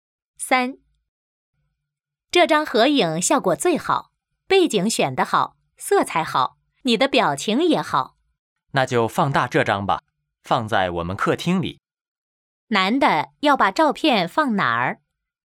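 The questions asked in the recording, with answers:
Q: 男的要把照片放哪儿?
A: 客厅里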